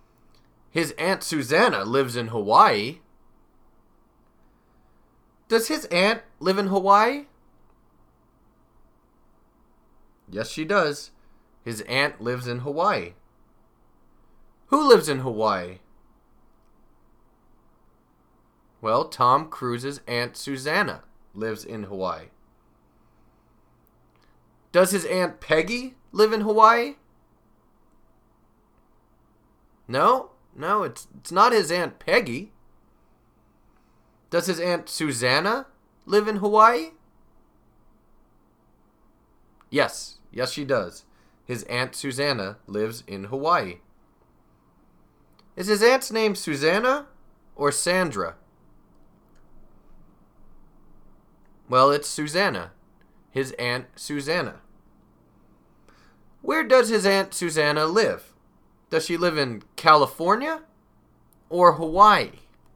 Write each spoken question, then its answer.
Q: Does she live in California or Hawaii?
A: Hawaii. She lives in Hawaii.